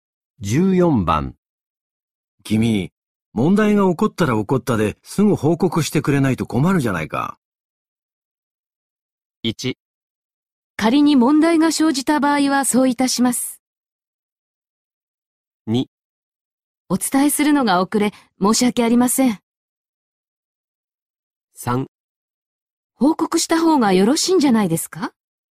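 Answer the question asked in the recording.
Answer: 2: お伝えするのが遅れ、申し訳ありません。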